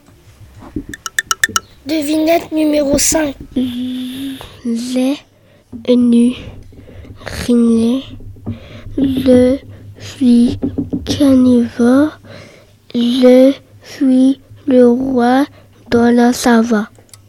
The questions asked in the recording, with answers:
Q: Les nus rhinés. Je suis carnivore. Je suis le roi de la savane.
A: Je suis le lion.